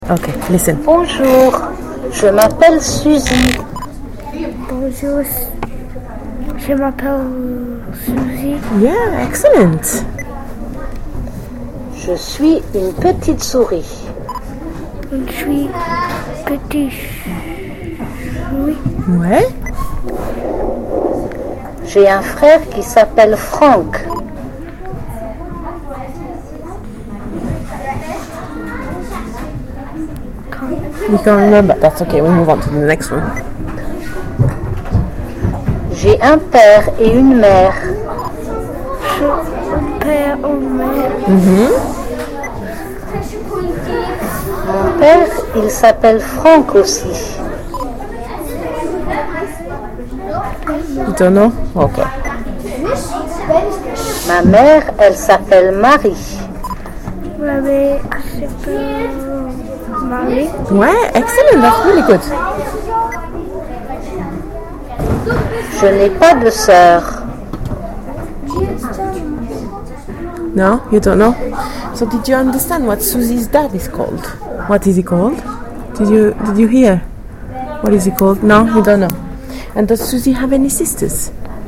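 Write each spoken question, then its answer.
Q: What is he called?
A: Franck

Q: And does Susie have any sisters?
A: No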